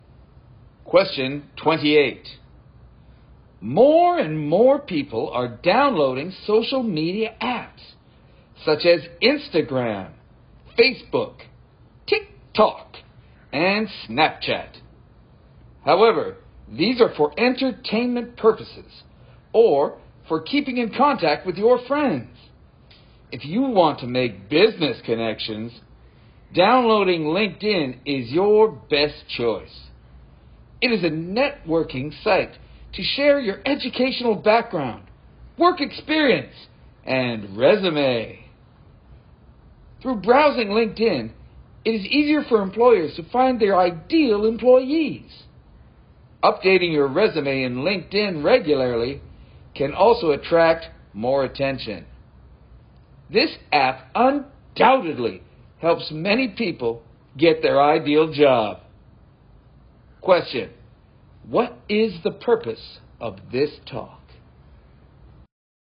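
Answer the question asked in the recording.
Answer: To recommend LinkedIn as an app for making business connections and finding jobs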